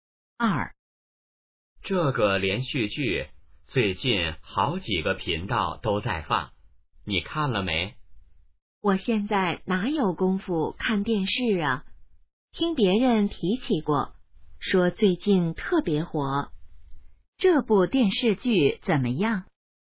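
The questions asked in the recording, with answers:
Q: 这部电视剧怎么样?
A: 最近特别火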